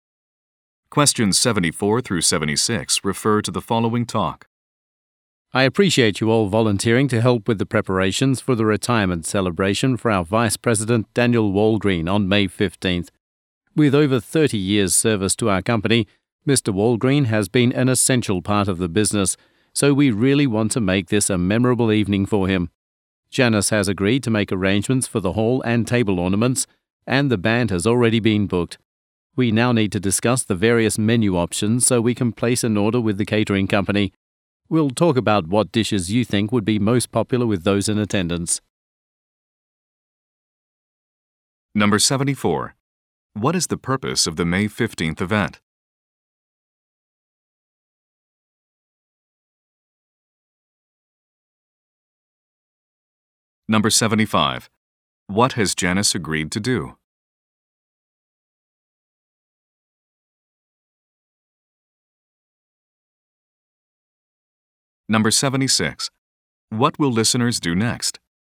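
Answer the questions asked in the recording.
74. To celebrate a retirement
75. Arrange the hall and table decorations
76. Discuss menu options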